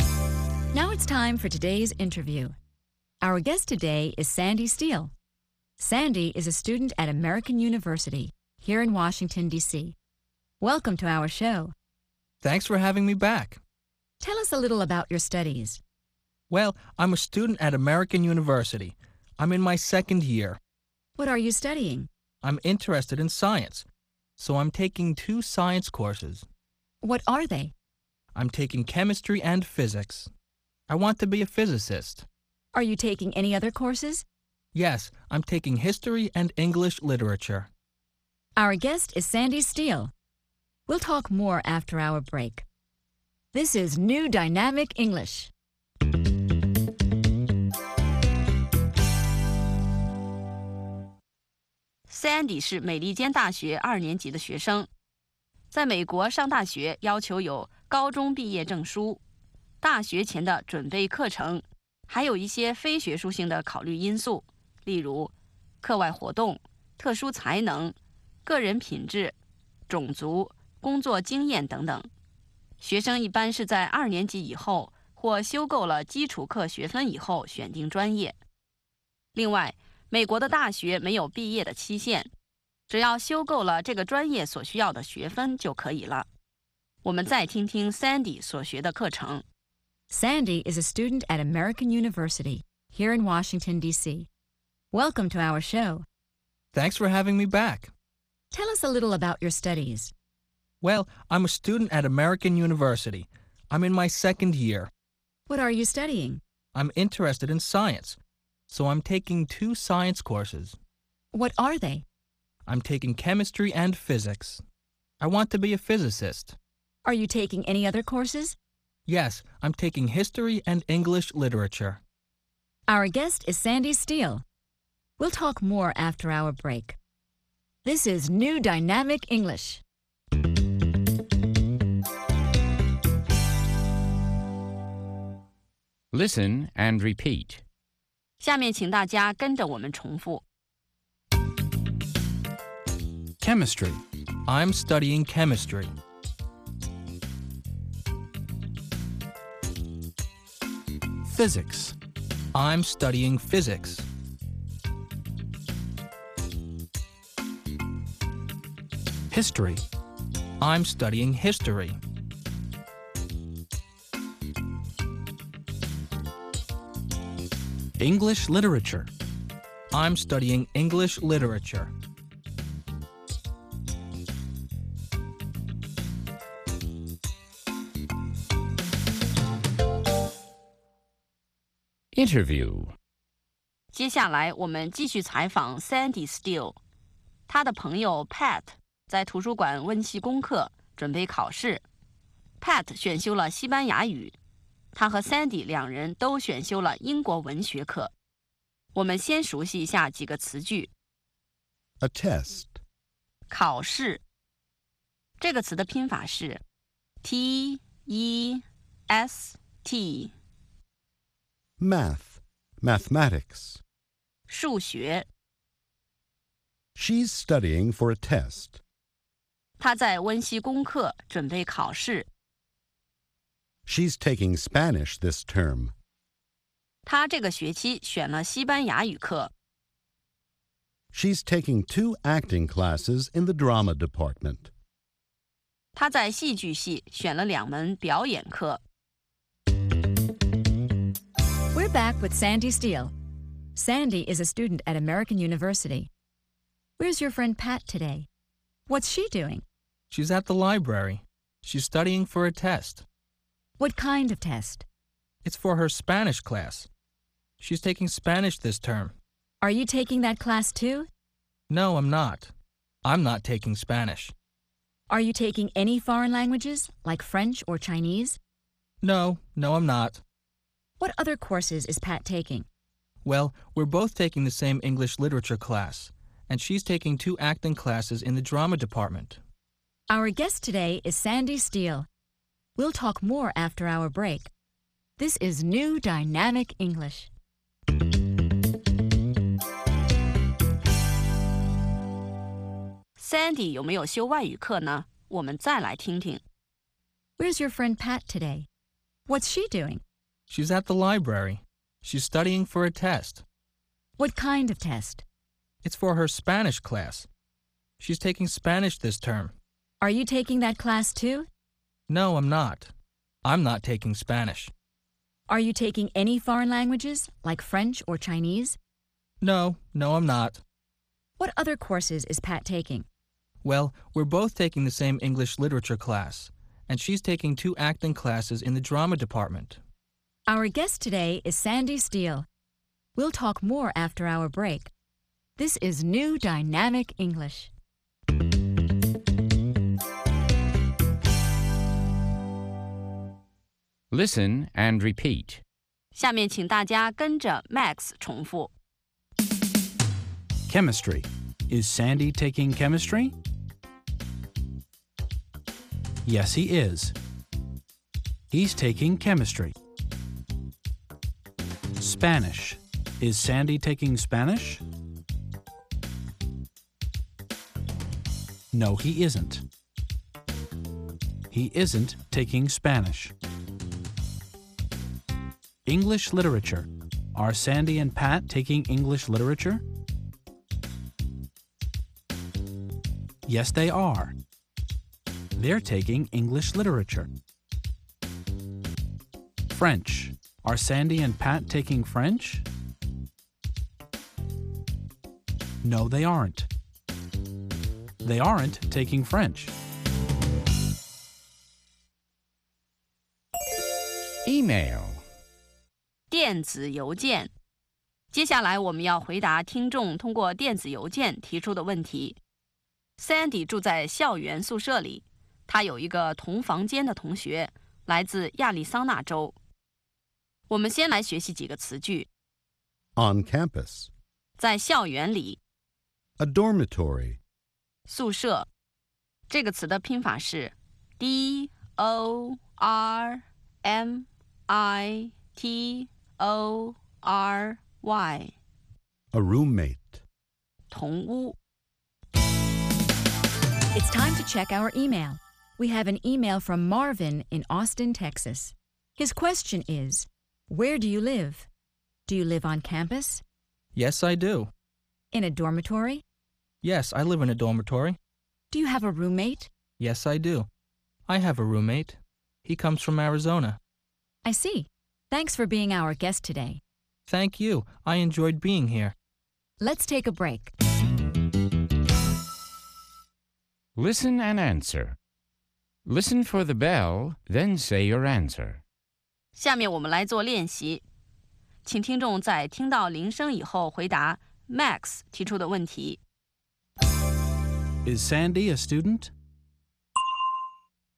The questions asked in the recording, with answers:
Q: Is Sandy a student?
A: Yes, he is. He's a student.